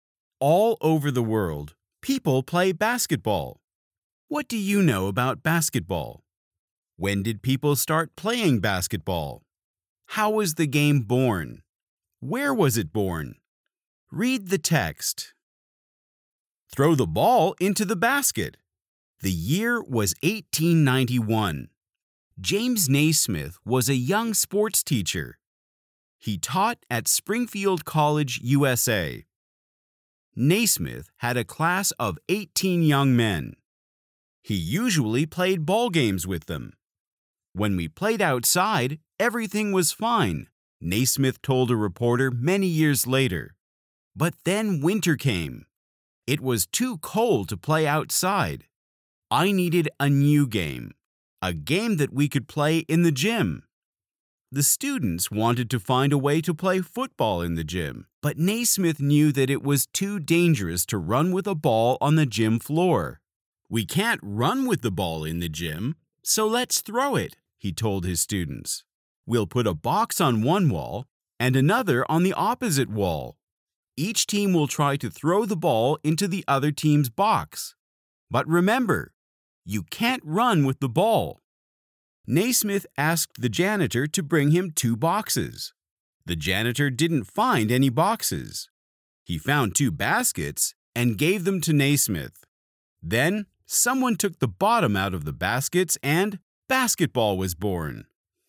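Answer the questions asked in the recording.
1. In 1891
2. Naismith needed an indoor winter game, so players threw a ball into two baskets instead of running with it
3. At Springfield College, USA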